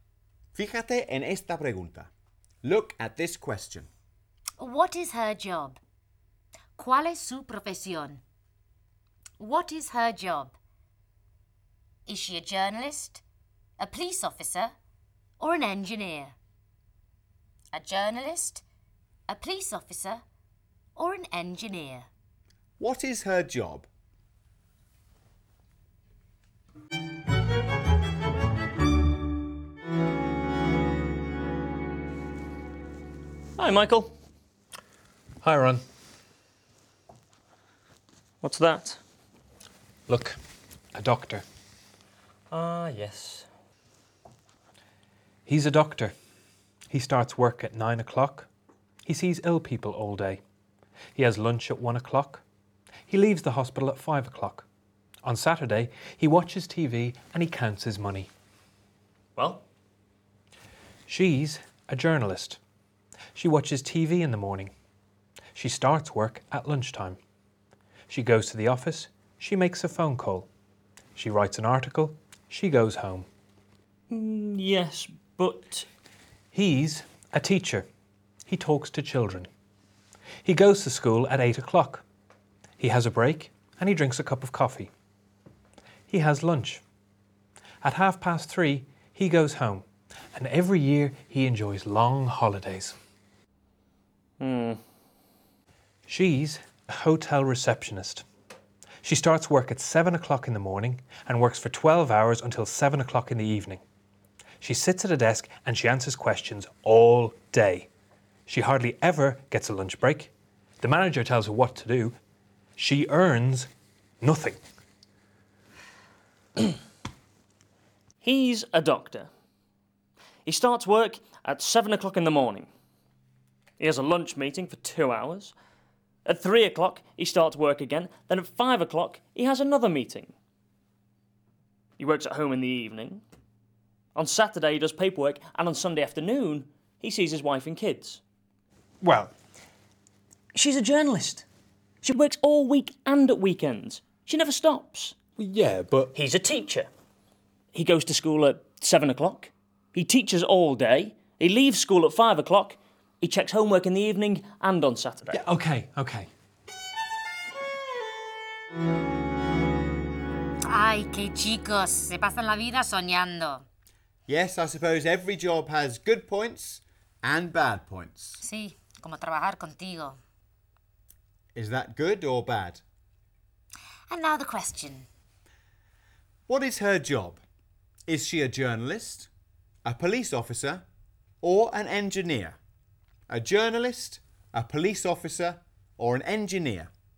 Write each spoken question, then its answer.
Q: What is her job? Is she a journalist, a police officer, or an engineer?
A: She's a journalist.